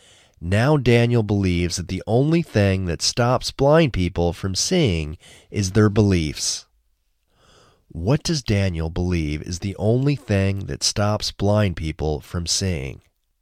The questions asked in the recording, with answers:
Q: What does Daniel believe is the only thing that stops blind people from seeing?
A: Daniel believes that the only thing that stops blind people from seeing is their beliefs.